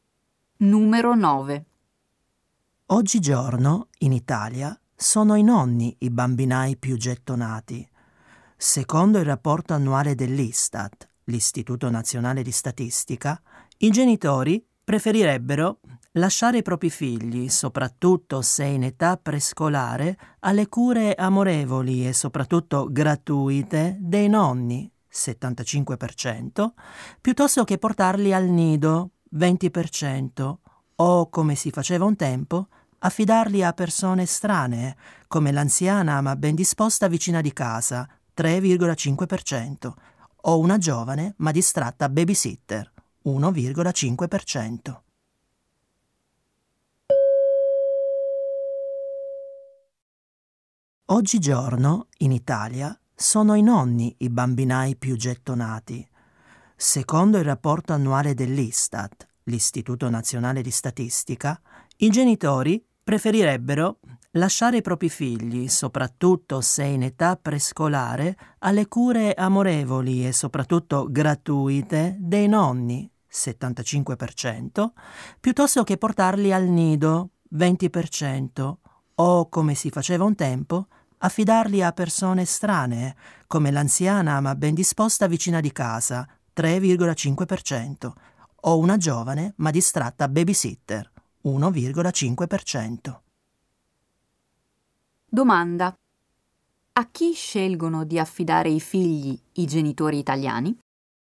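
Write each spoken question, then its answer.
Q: A chi scelgono di affidare i figli i genitori italiani?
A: Ai nonni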